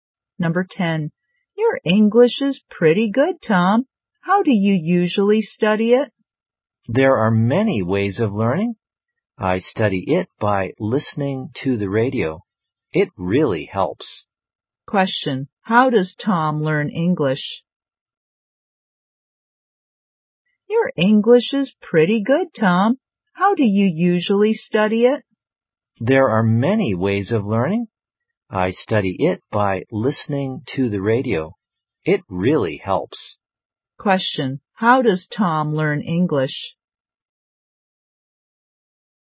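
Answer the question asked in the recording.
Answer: By listening to the radio.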